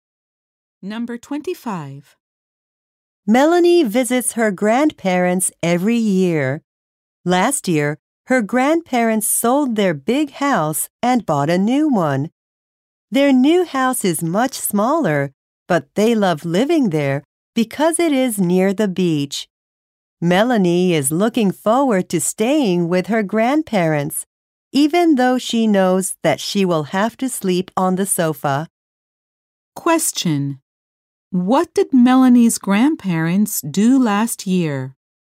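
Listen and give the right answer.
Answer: They sold their big house and bought a smaller one near the beach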